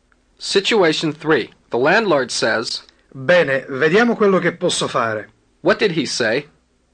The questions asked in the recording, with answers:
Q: What did he say?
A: He said, "Well, let's see what I can do."